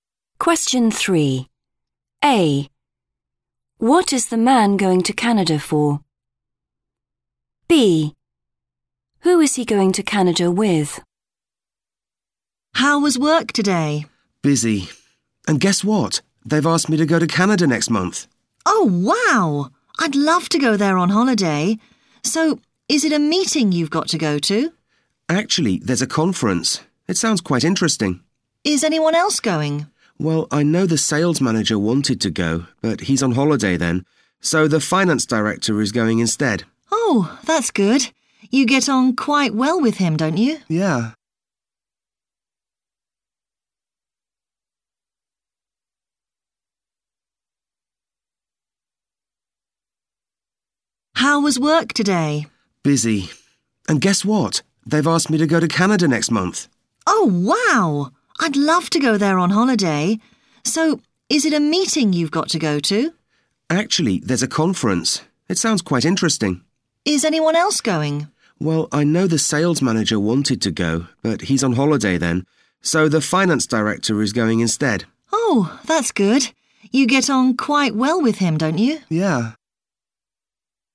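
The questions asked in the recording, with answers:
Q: What is the man going to Canada for?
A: a conference

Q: Who is he going to Canada with?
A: the finance director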